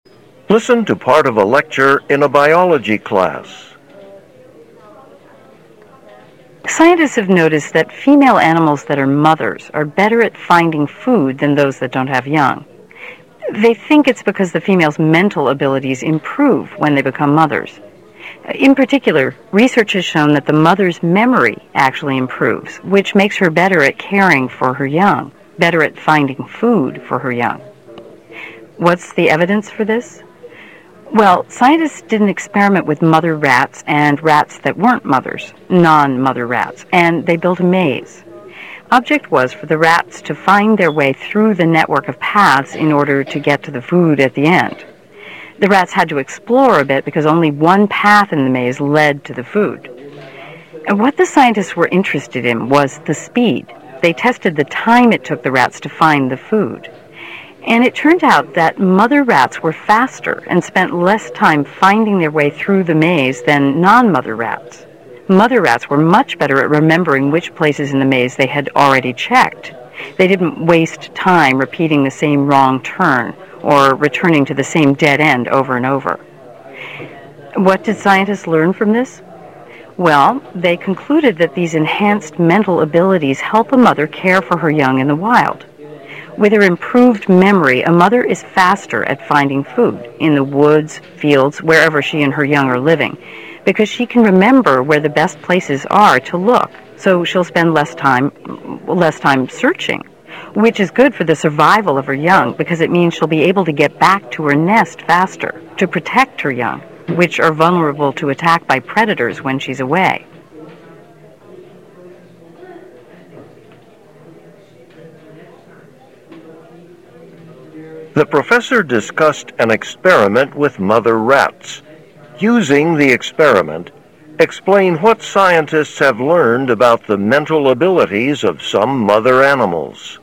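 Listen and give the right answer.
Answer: Mothers' memory improves: in a maze, mother rats found food faster than non-mother rats because they remembered where they'd already checked, which in the wild helps them find food faster and return to protect their young.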